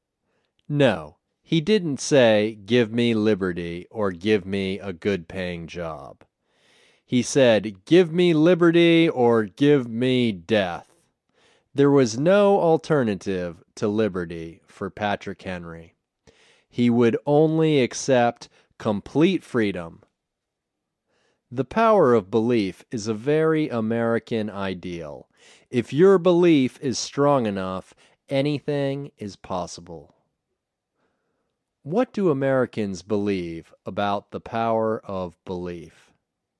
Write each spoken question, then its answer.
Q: What do Americans believe about the power of belief?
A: They believe that if your belief is strong enough, anything is possible.